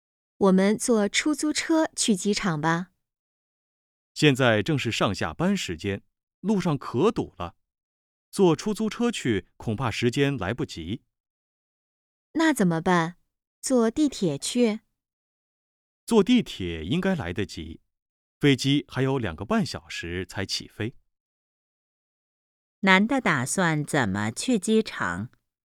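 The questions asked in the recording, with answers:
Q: 男的打算怎么去机场?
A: 坐地铁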